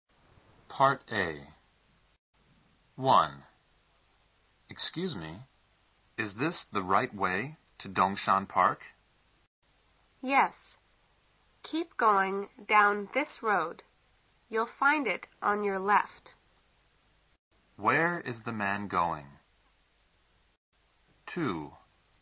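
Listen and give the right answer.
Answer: To Dongshan Park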